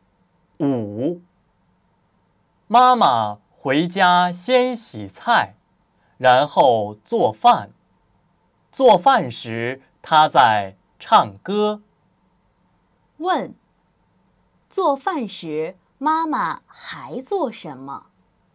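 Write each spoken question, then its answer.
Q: 问,做饭时,妈妈还做什么?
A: 唱歌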